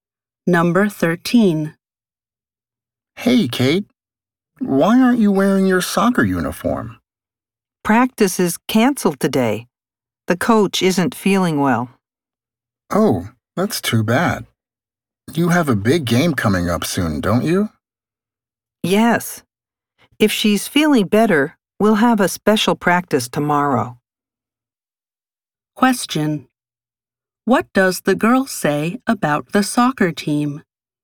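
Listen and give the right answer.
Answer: Practice is canceled today because the coach isn't feeling well.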